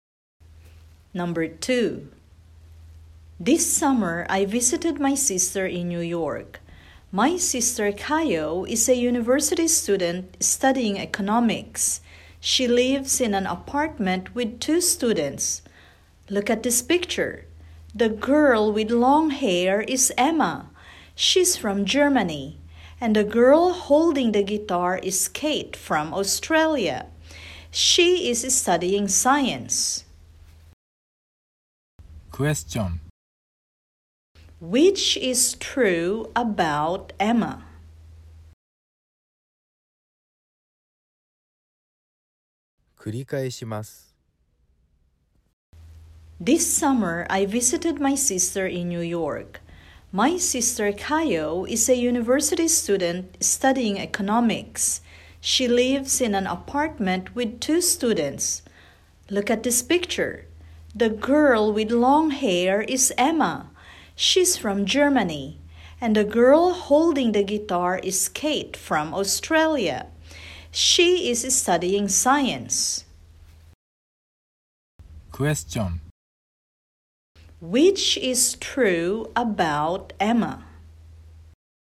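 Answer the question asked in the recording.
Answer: She has long hair and is from Germany.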